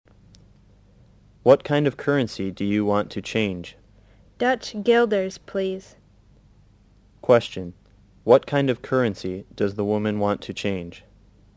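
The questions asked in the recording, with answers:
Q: What kind of currency does the woman want to change?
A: Dutch guilders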